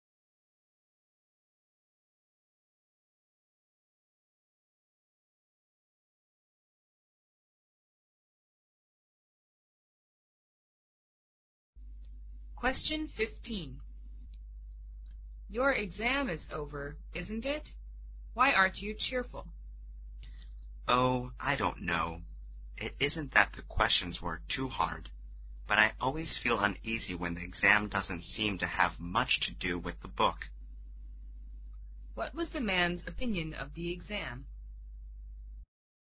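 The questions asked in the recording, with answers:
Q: What was the man's opinion of the exam?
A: It didn't have much to do with the book.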